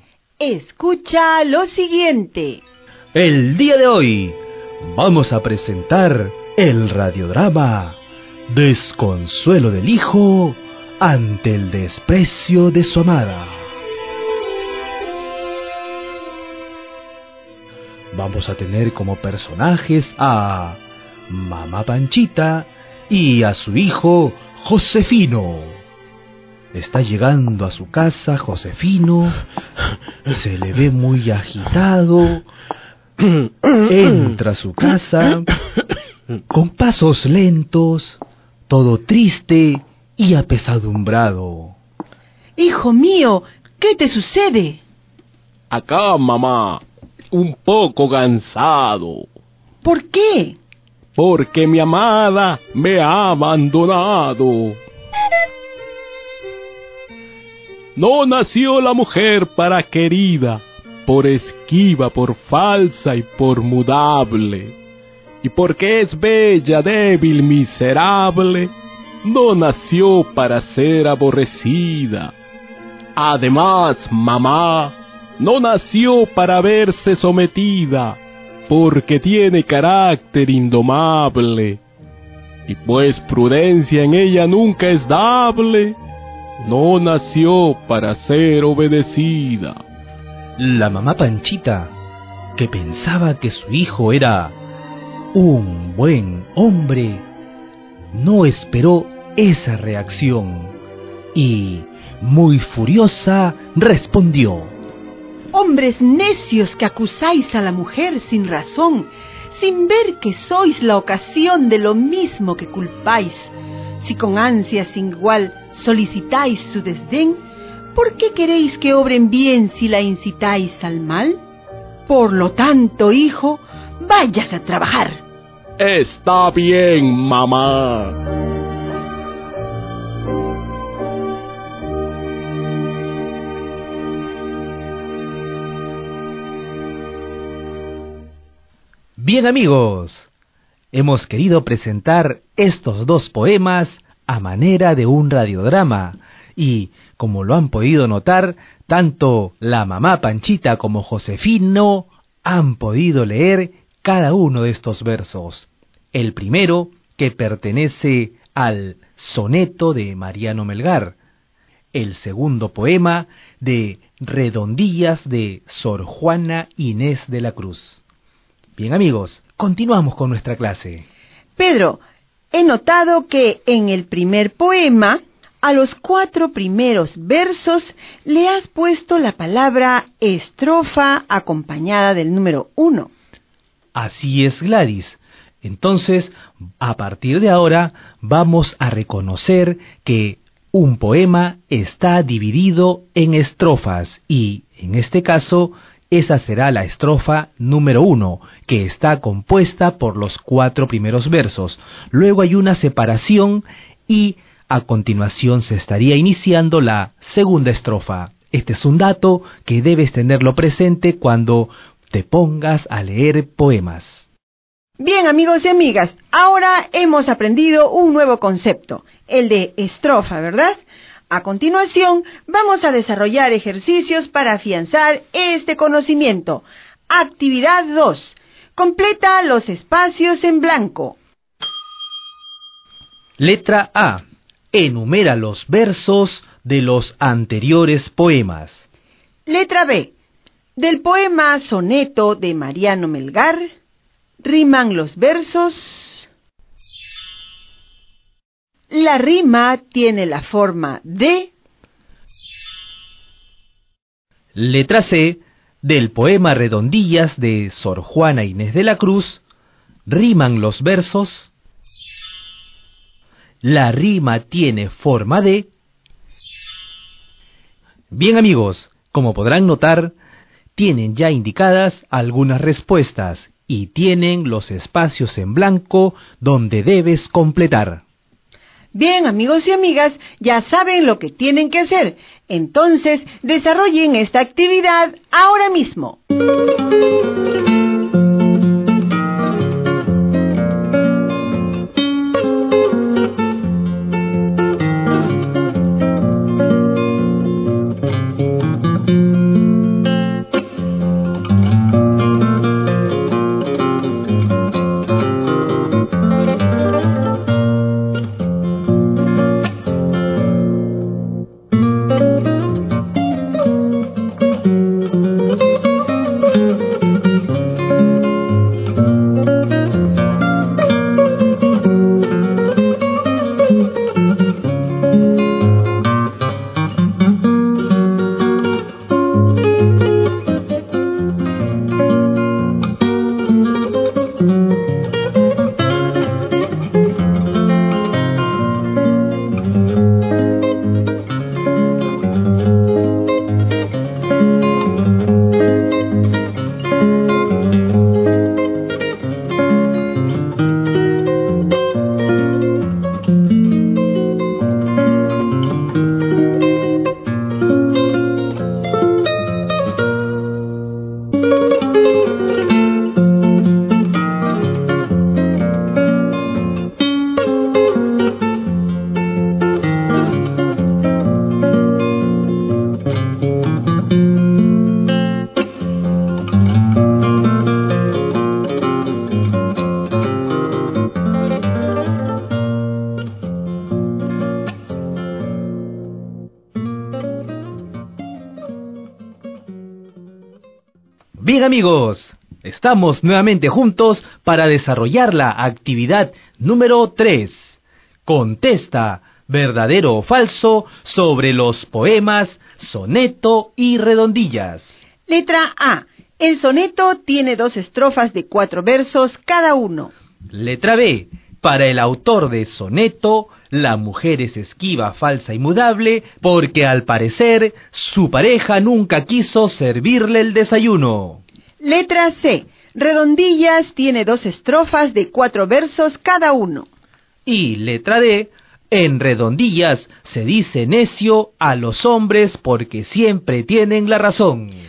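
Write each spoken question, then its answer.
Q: Para el autor de Soneto, la mujer es esquiva, falsa y mudable, porque al parecer su pareja nunca quiso servirle el desayuno.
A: Falso

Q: En Redondillas se dice necio a los hombres porque siempre tienen la razón.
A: Falso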